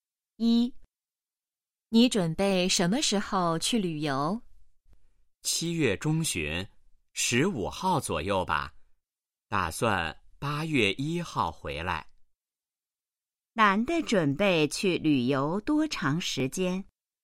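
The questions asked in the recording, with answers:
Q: 男的准备去旅游多长时间?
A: 半个月左右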